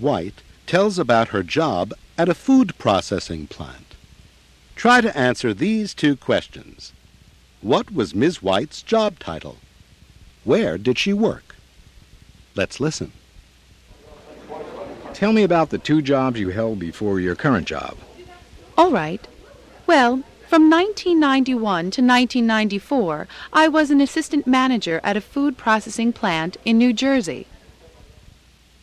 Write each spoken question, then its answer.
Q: What was Ms. White's job title?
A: She was assistant manager.

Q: Where did she work?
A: Ms. White didn't give the name of the company, but she said she worked at a food processing plant in New Jersey.